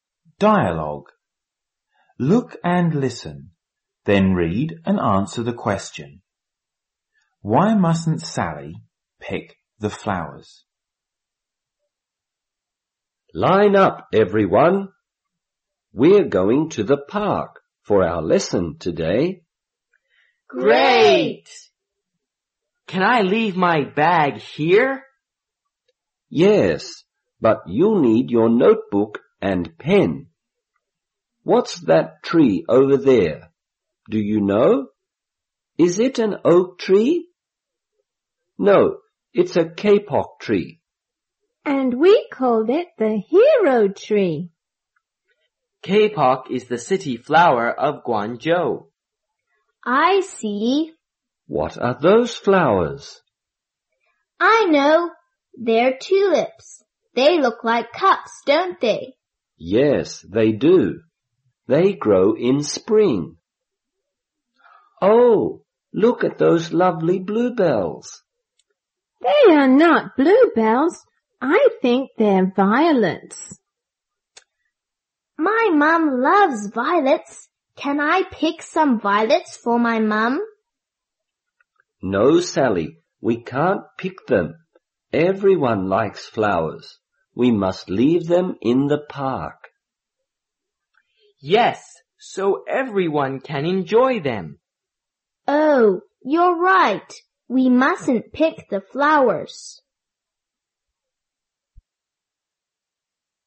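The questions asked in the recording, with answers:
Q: Why mustn't Sally pick the flowers?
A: Everyone likes flowers; they must stay in the park so everyone can enjoy them.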